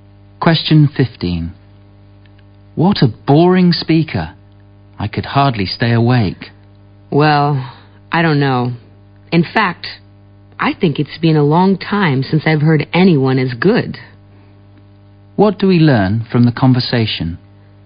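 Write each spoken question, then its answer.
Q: What do we learn from the conversation?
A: The speakers disagree: the man thought the speaker was very good.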